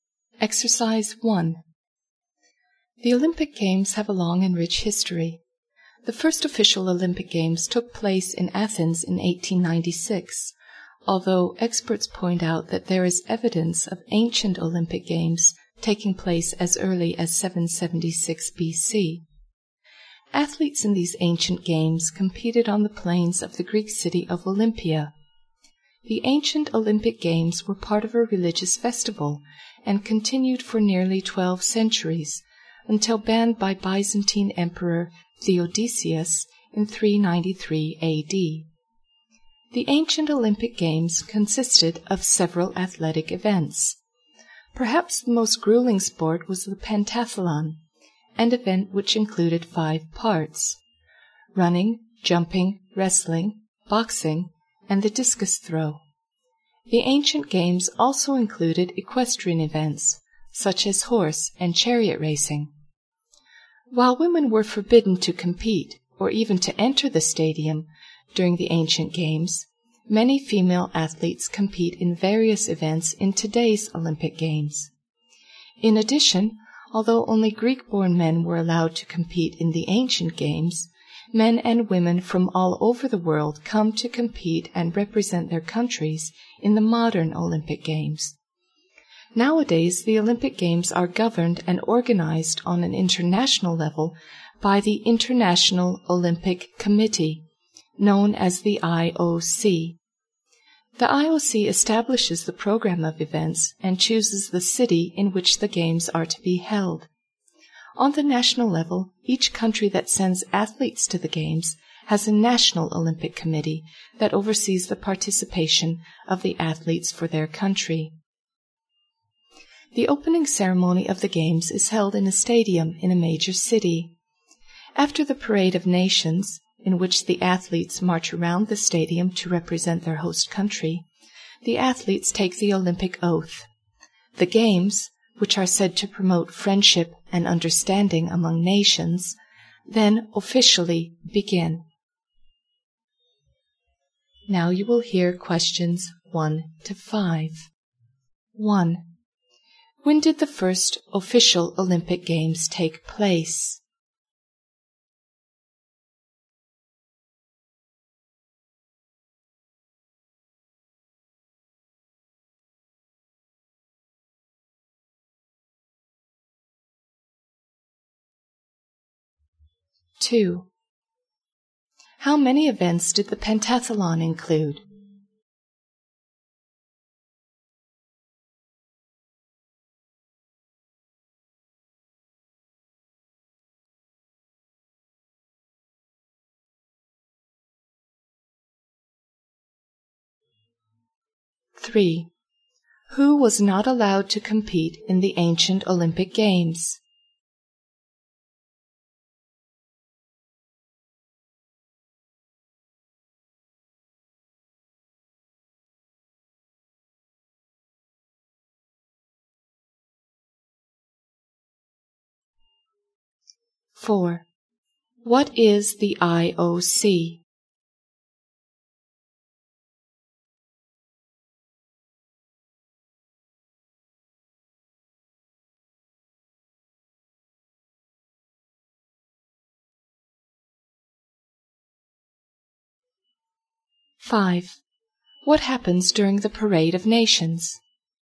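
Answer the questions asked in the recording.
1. In 1896, in Athens
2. Five
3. Women (and men who were not born in Greece)
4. The International Olympic Committee, which governs and organizes the Games
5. The athletes march around the stadium to represent their country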